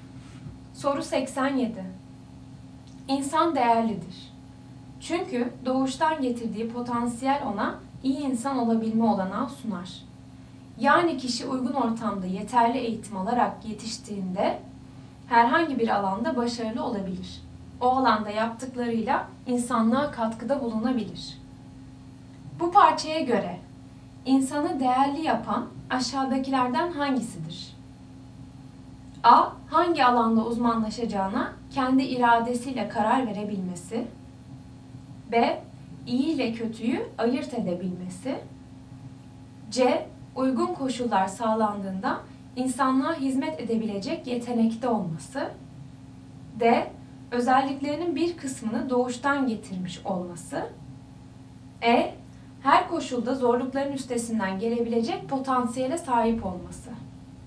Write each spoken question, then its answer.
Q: Bu parçaya göre insanı değerli yapan aşağıdakilerden hangisidir?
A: Doğru cevap C. Uygun koşullar sağlandığında insanlığa hizmet edebilecek yetenekte olması.